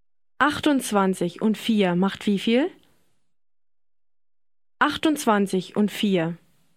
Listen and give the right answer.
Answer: 32. 32.